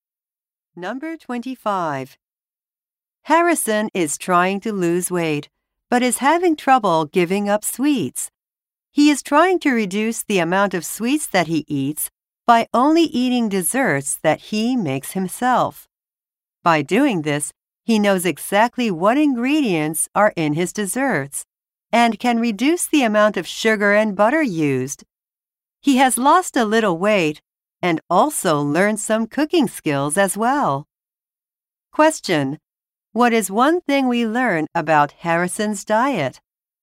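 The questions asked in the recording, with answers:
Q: What is one thing we learn about Harrison's diet?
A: He only eats desserts he makes himself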